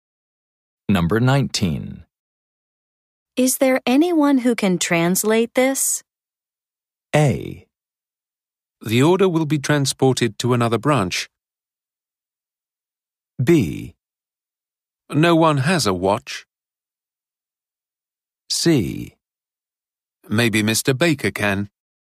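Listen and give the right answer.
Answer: C: Maybe Mr. Baker can.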